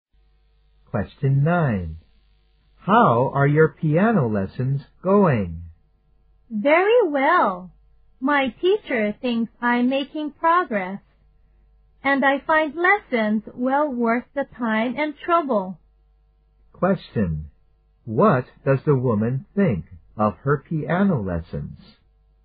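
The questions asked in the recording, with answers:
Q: What does the woman think of her piano lessons?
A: They are well worth the time and trouble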